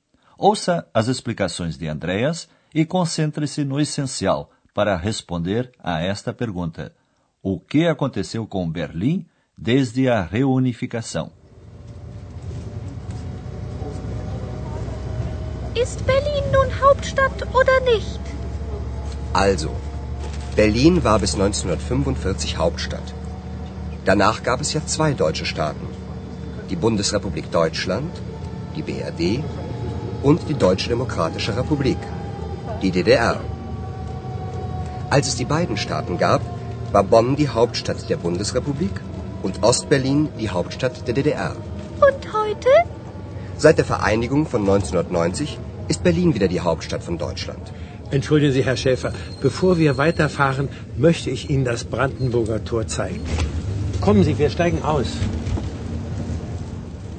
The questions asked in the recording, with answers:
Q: O que aconteceu com Berlim desde a reunificação?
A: Desde a reunificação dos dois estados alemães em 1990, Berlim tornou-se novamente a capital da Alemanha.